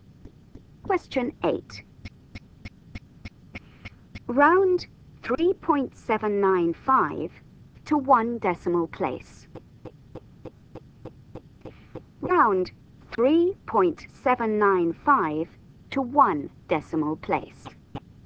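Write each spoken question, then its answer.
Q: Round 3.795 to one decimal place.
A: 3.8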